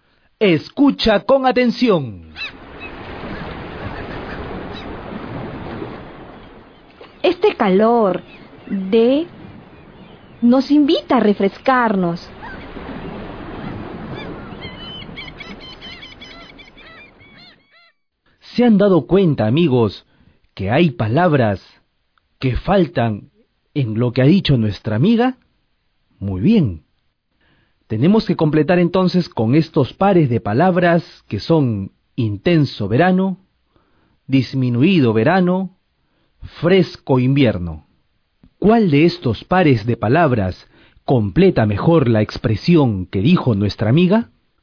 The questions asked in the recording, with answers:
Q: ¿Cuál de estos pares de palabras completa mejor la expresión que dijo nuestra amiga?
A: Este calor intenso de verano nos invita a refrescarnos.